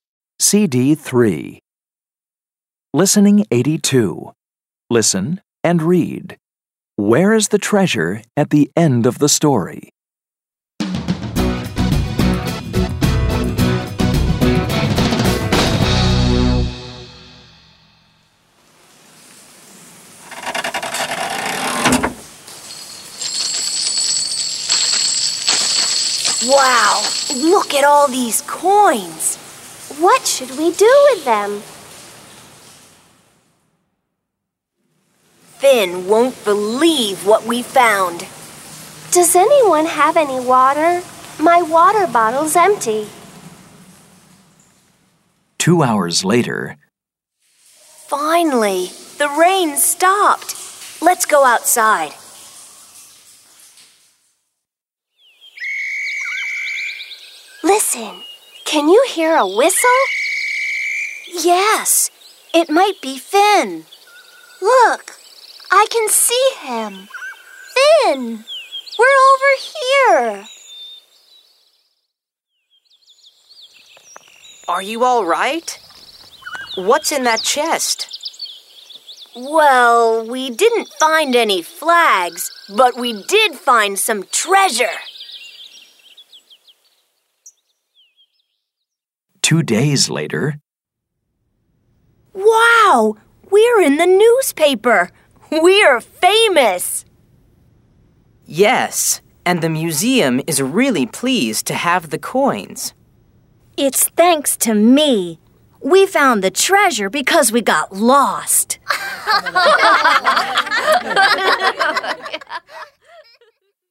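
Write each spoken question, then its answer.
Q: Where is the treasure at the end of the story?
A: In the museum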